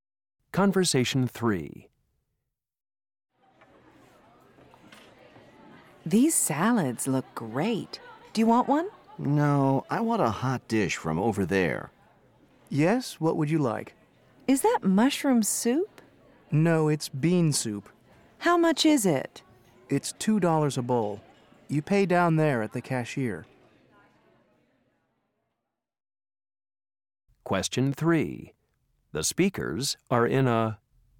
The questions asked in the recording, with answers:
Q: The speakers are in a...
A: I hear this cafeteria is open all night.